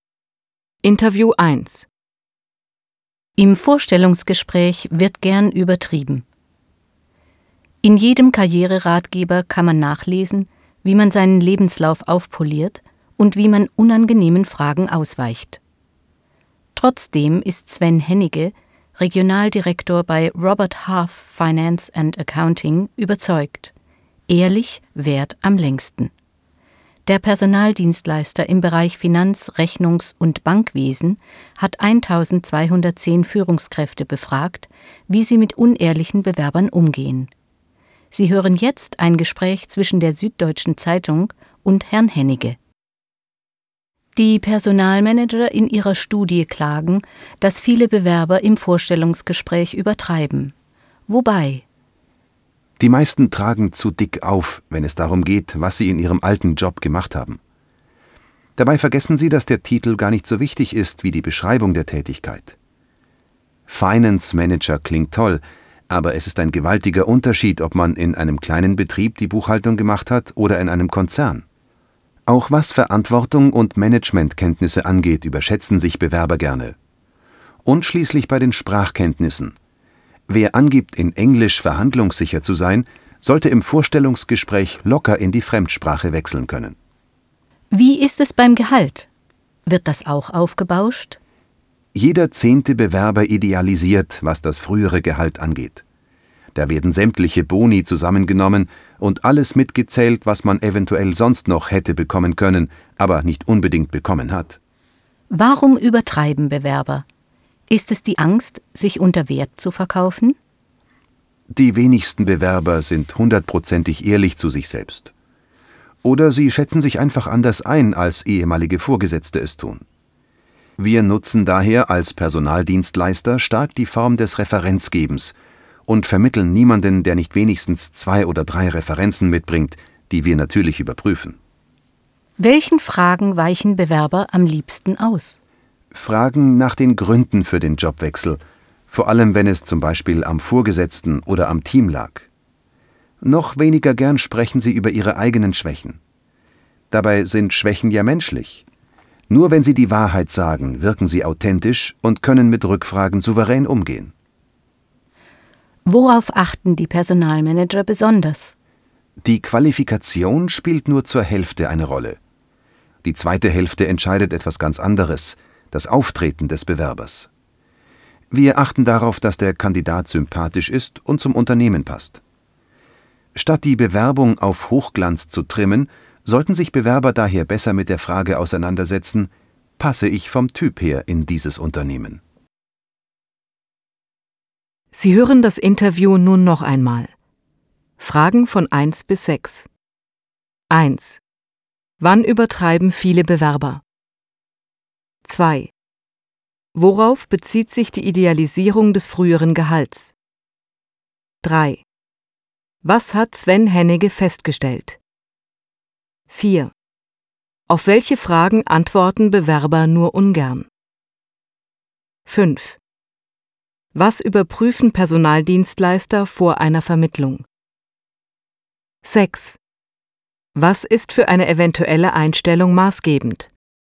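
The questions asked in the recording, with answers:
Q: Wann übertreiben viele Bewerber?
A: Im Vorstellungsgespräch, vor allem bei der Beschreibung ihrer Tätigkeit im alten Job

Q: Worauf bezieht sich die Idealisierung des früheren Gehalts?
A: Sämtliche Boni und alles, was man eventuell hätte bekommen können, werden mitgezählt

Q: Auf welche Fragen antworten Bewerber nur ungern?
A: Fragen nach den Gründen für den Jobwechsel und nach eigenen Schwächen

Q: Was überprüfen Personaldienstleister vor einer Vermittlung?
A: Die Referenzen (mindestens zwei oder drei)

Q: Was ist für eine eventuelle Einstellung maßgebend?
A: Je zur Hälfte die Qualifikation und das Auftreten des Bewerbers (sympathisch, passt zum Unternehmen)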